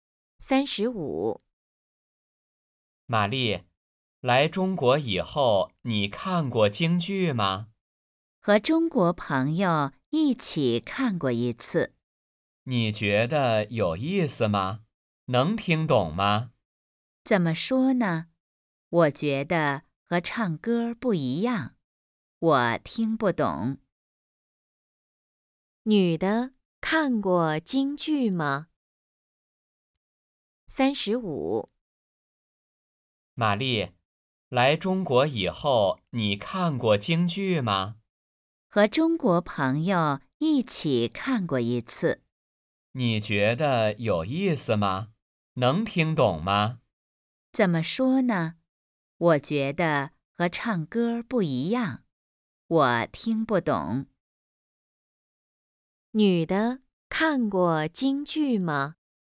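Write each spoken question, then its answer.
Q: 女的看过京剧吗?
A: 看过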